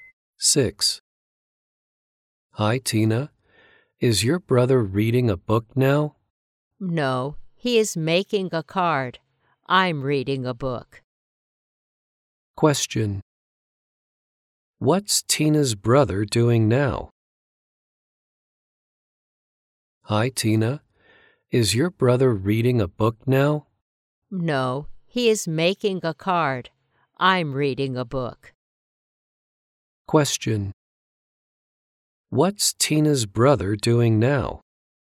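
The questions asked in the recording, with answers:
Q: What's Tina's brother doing now?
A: He is making a card.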